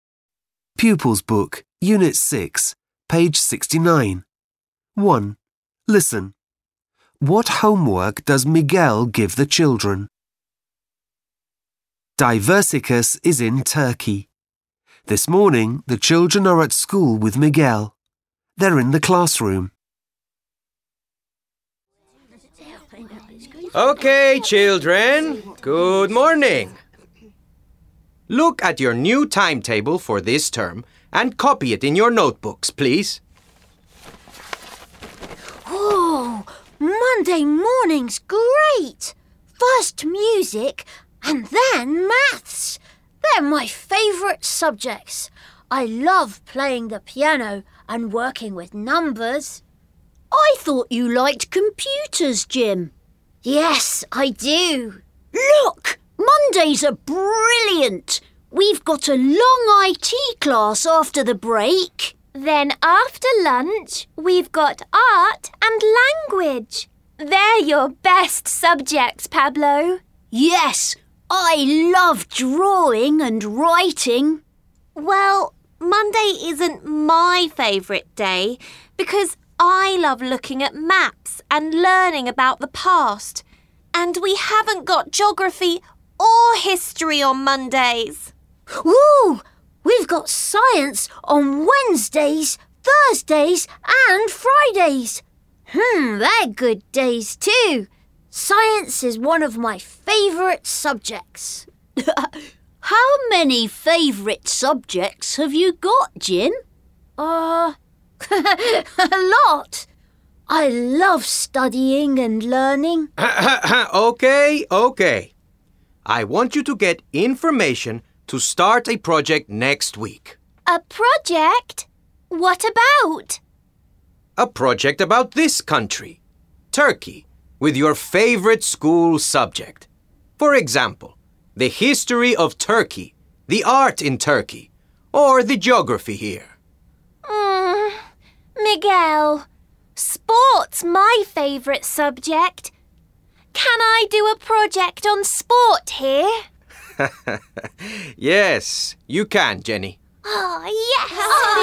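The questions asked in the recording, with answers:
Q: What homework does Miguel give the children?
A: To get information to start a project about Turkey with their favourite school subject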